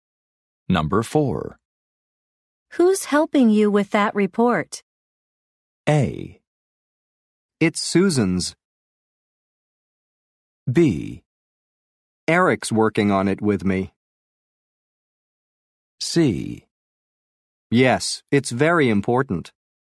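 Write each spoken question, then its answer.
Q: Who's helping you with that report?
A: B: Eric's working on it with me.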